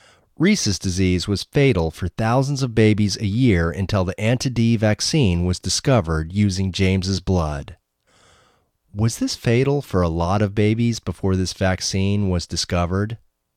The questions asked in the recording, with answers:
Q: Was this fatal for a lot of babies before this vaccine was discovered?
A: Yes, this was fatal for lots of babies before this vaccine was discovered.